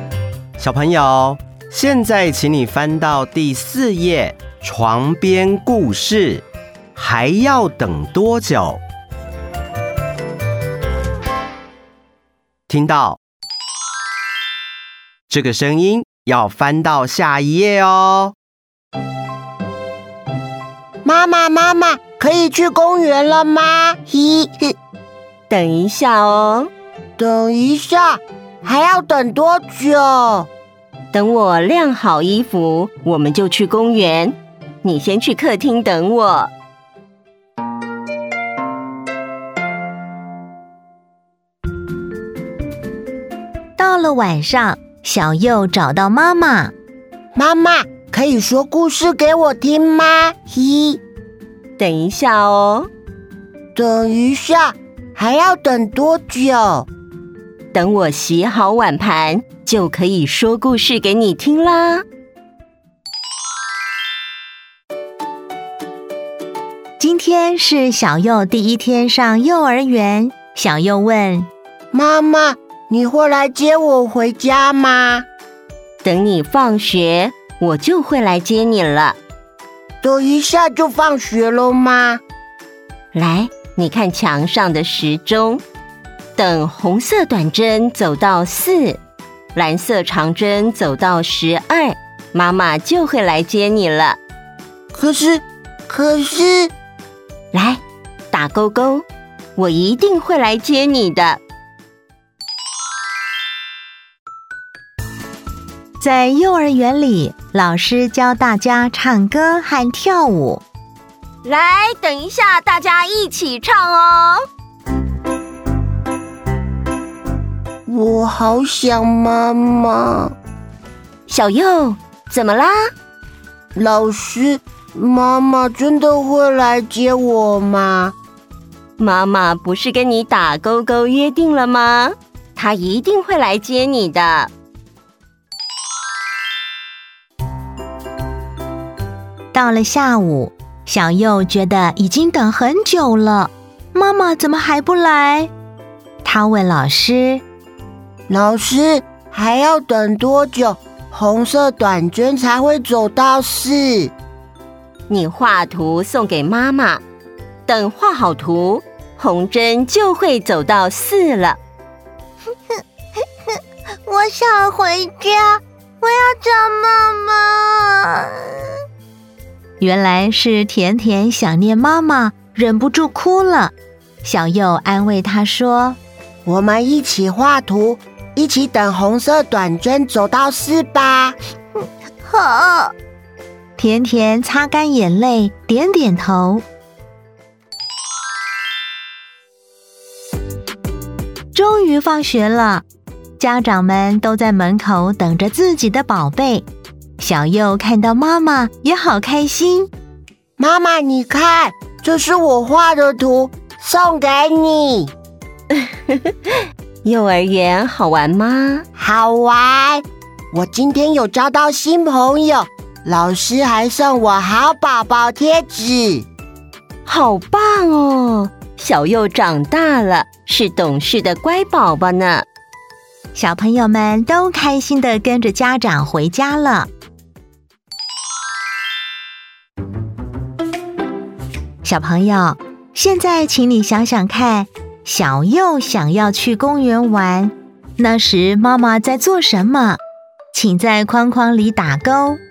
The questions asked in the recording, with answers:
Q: 小朋友,现在请你想想看,小佑想要去公园玩,那时妈妈在做什么?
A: 晾衣服。